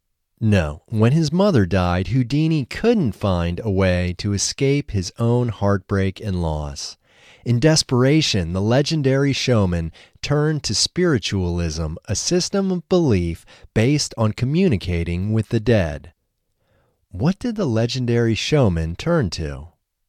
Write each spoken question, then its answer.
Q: What did the legendary showman turn to?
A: The legendary showman turned to spiritualism.